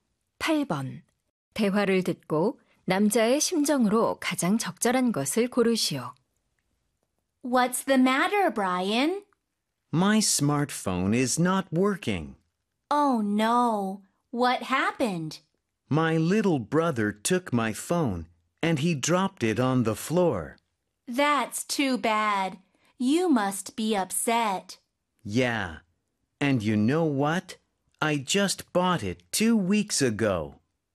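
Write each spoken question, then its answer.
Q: 대화를 듣고 남자의 심정으로 가장 적절한 것을 고르시오.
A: 속상함 (upset)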